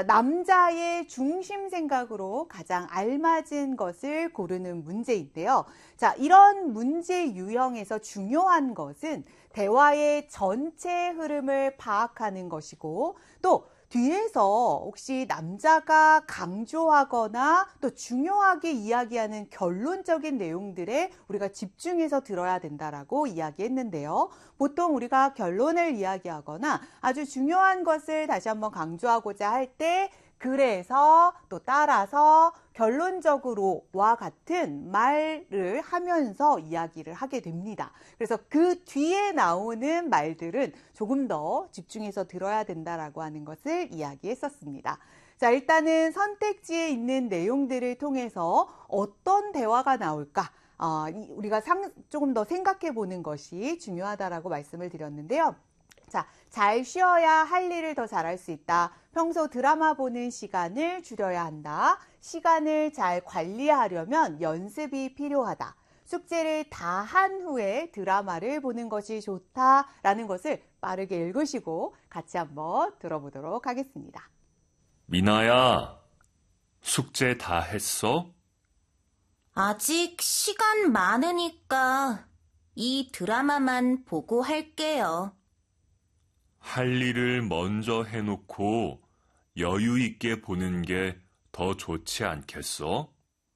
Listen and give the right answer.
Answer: 그렇기 때문에 정답은 4번이 되는 것이죠.